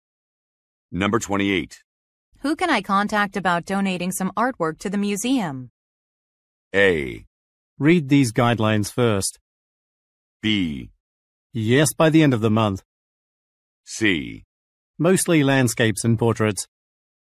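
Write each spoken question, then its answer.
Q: Who can I contact about donating some artwork to the museum?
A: A: Read these guidelines first.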